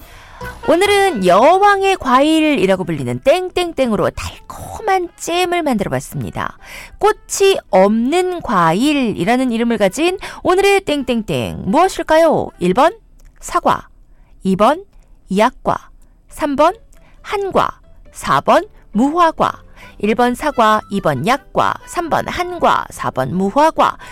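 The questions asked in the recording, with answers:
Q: 꽃이 없는 과일이라는 이름을 가진 오늘의 땡땡땡 무엇일까요?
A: 4: 무화과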